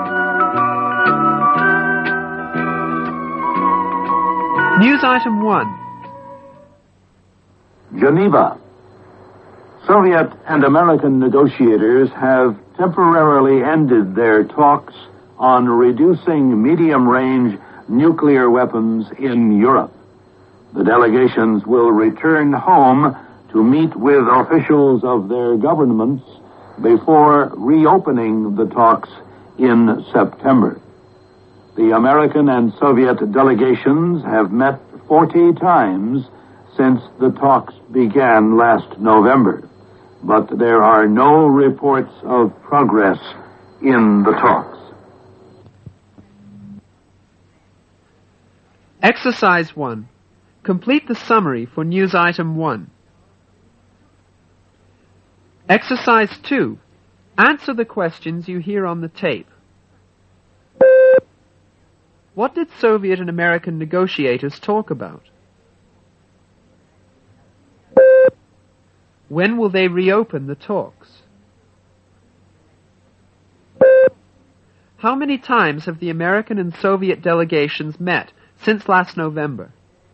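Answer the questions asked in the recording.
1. Reducing medium-range nuclear weapons in Europe
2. In September
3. 40 times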